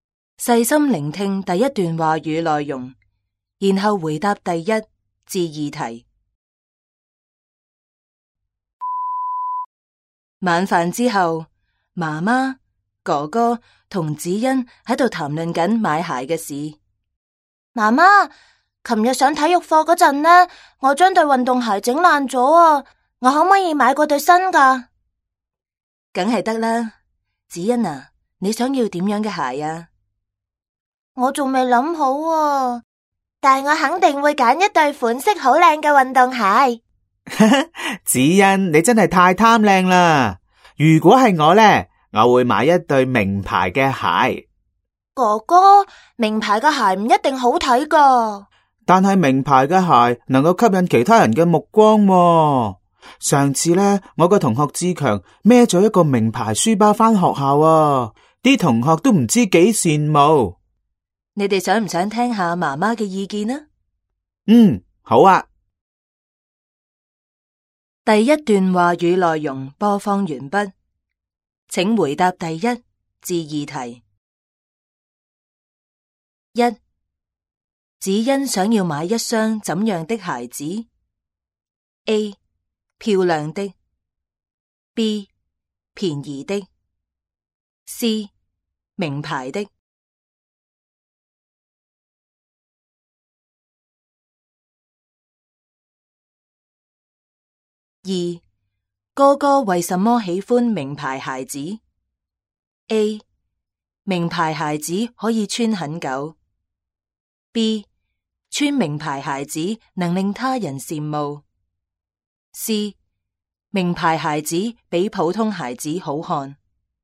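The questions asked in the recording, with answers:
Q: 子欣想要买一双怎样的鞋子 ?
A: A: 漂亮的

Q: 哥哥为什么喜欢名牌鞋子 ?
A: B: 穿名牌鞋子能令他人羡慕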